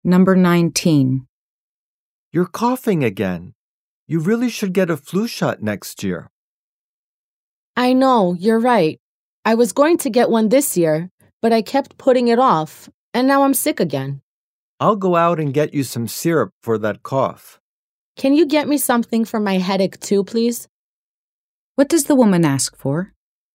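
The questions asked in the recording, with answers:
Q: What does the woman ask for?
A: Something for her headache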